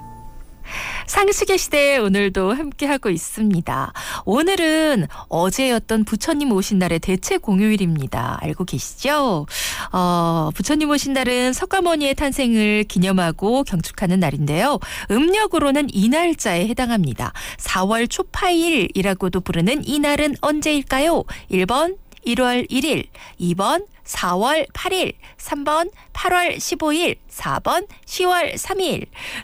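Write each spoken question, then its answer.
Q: 4월 초파일이라고도 부르는 이 날은 언제일까요?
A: 2: 4월 8일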